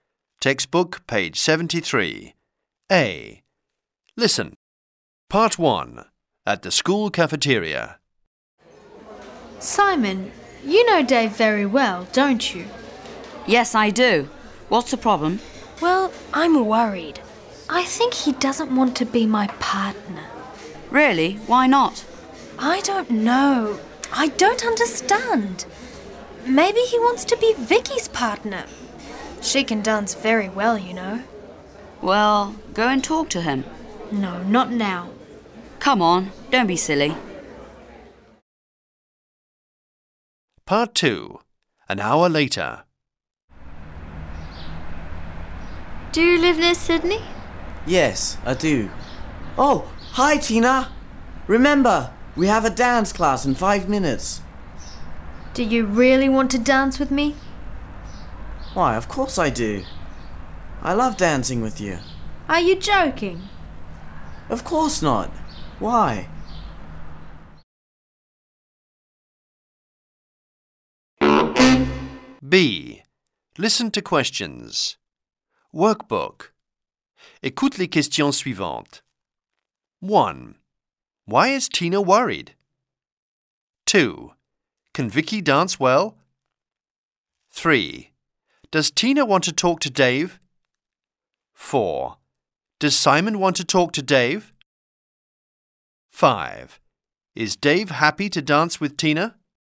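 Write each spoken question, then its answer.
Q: Why is Tina worried?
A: She thinks Dave doesn't want to be her partner.

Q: Can Vicky dance well?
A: Yes, she can.

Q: Does Tina want to talk to Dave?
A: No, not now.

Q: Is Dave happy to dance with Tina?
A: Yes, he loves dancing with her.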